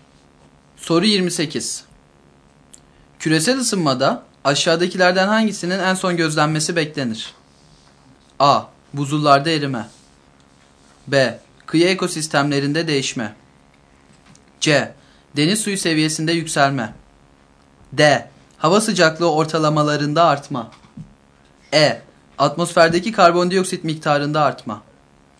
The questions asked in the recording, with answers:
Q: Küresel ısınmada aşağıdakilerden hangisinin en son gözlenmesi beklenir?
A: Doğru yanıt B şıkkı.